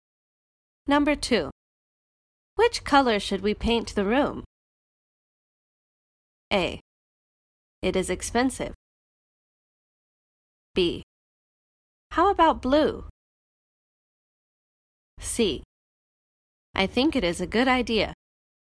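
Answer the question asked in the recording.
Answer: B: How about blue?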